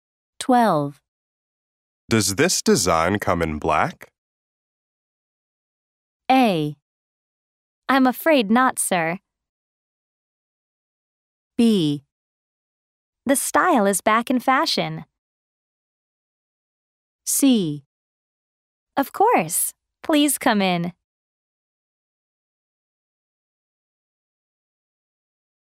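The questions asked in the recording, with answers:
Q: Does this design come in black?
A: A: I'm afraid not, sir.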